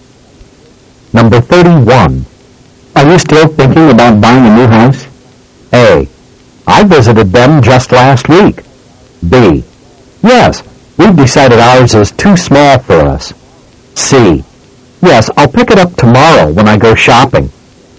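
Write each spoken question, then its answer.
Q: Are you still thinking about buying a new house?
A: B: Yes, we've decided ours is too small for us.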